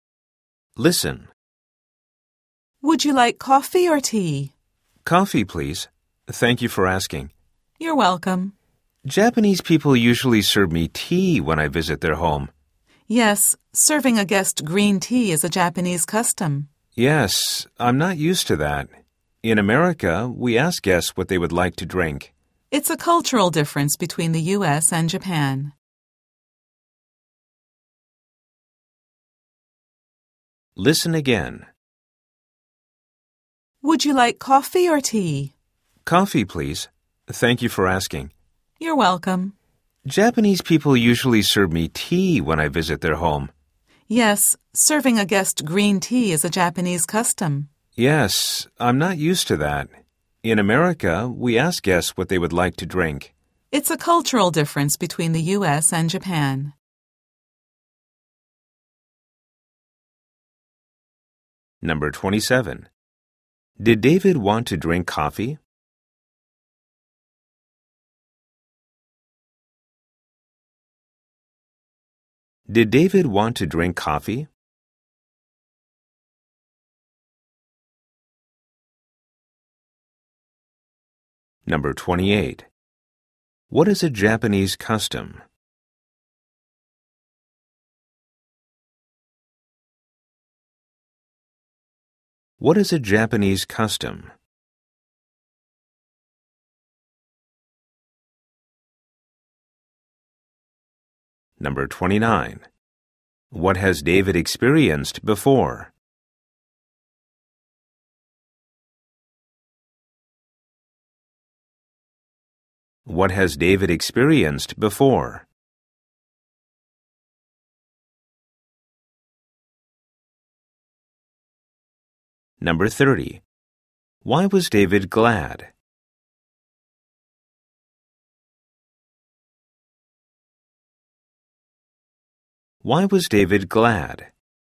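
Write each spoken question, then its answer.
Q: Did David want to drink coffee?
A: Yes, he did.

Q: What is a Japanese custom?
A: Serving a guest green tea.

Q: What has David experienced before?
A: Japanese people usually served him tea when he visited their homes.

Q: Why was David glad?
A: Because he was asked what he would like to drink.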